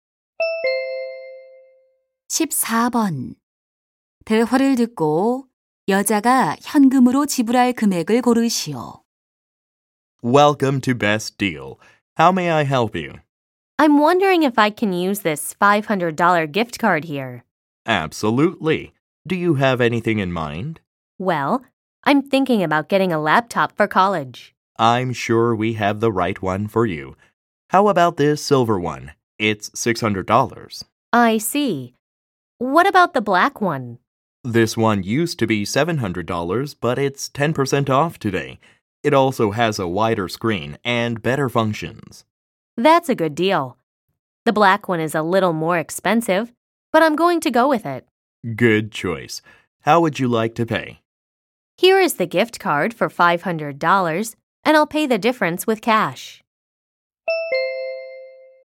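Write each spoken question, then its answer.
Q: 대화를 듣고 여자가 현금으로 지불할 금액을 고르시오.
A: $130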